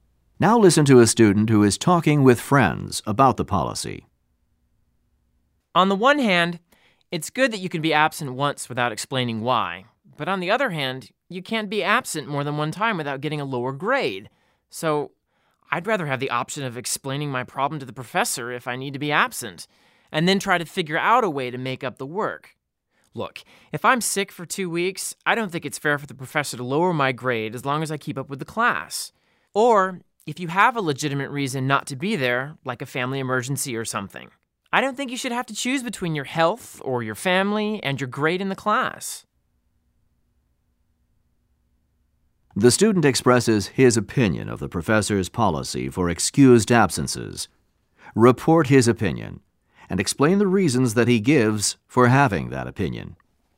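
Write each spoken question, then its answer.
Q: The student expresses his opinion of the professor's policy for excused absences. Report his opinion and explain the reasons that he gives for having that opinion.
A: He dislikes the policy. He would rather explain his problem to the professor and make up the work. It is unfair to lower his grade for a long illness if he keeps up, or to make students choose between their health or family and their grade.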